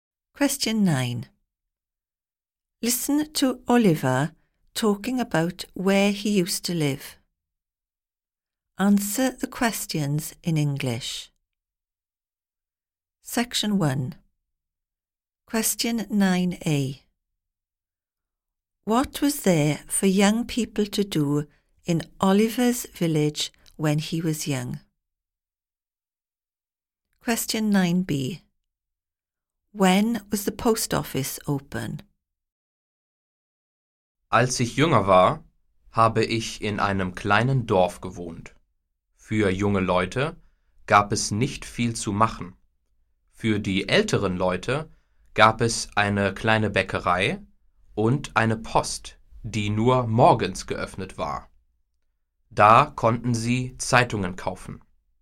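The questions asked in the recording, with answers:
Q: What was there for young people to do in Oliver's village when he was young?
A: Not much

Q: When was the post office open?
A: Only in the mornings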